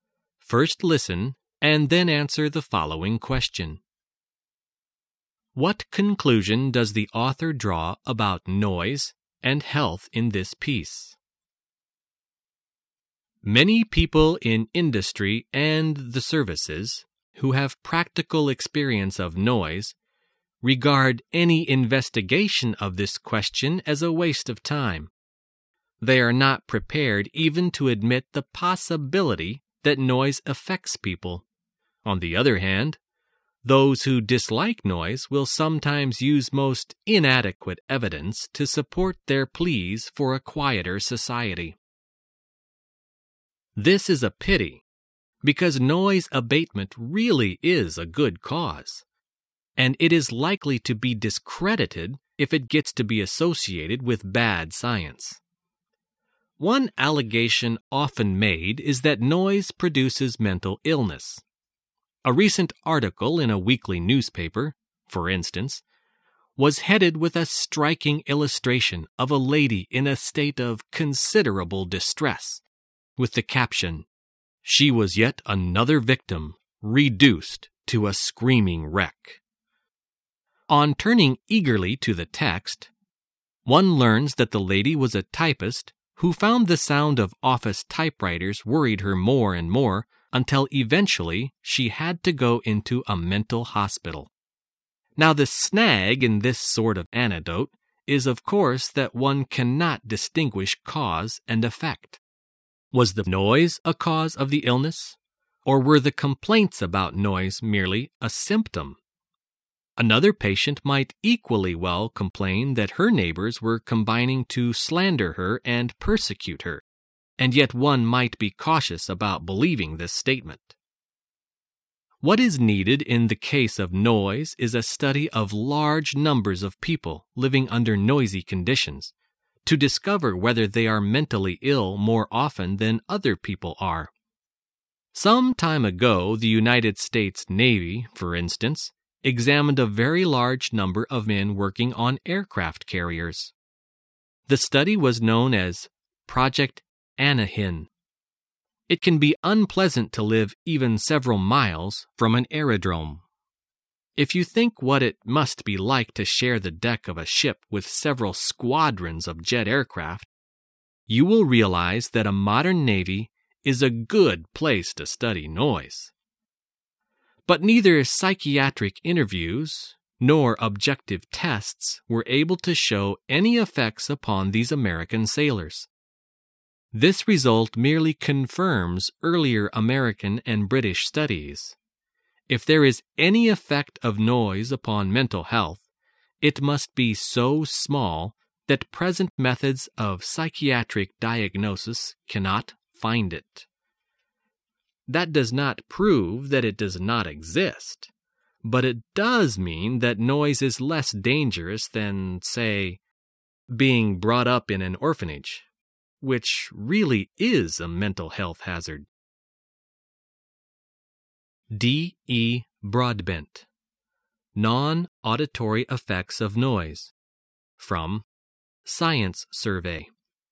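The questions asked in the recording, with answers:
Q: What conclusion does the author draw about noise and health in this piece?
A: Any effect of noise on mental health is too small to detect with present methods; noise is less dangerous than often claimed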